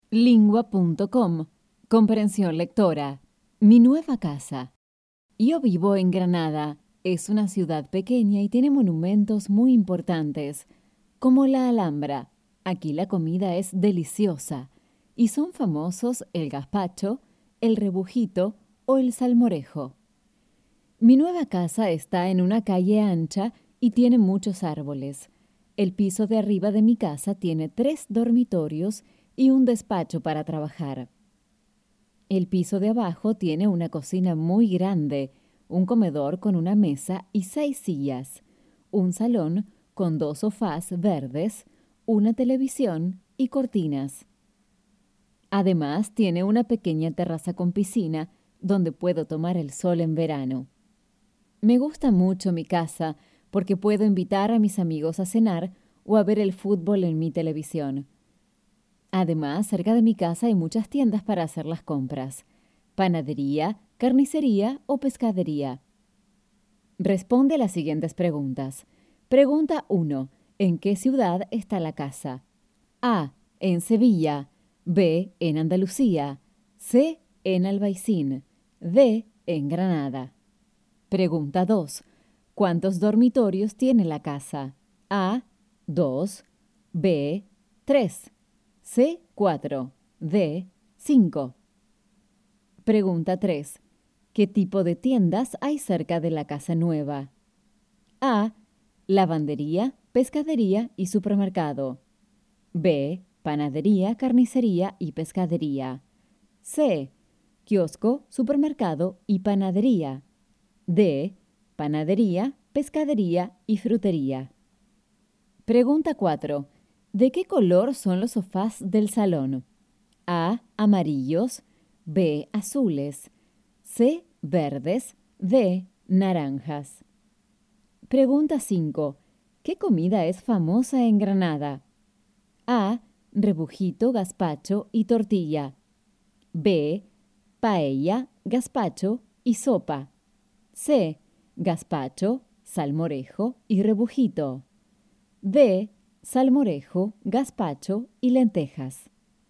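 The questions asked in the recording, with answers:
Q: ¿En qué ciudad está la casa?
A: D: En Granada.

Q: ¿Cuántos dormitorios tiene la casa?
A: B: 3.

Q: ¿Qué tipo de tiendas hay cerca de la casa nueva?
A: B: Panadería, carnicería y pescadería.

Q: ¿De qué color son los sofás del salón?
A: C: Verdes.

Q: ¿Qué comida es famosa en Granada?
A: C: Gazpacho, salmorejo y rebujito.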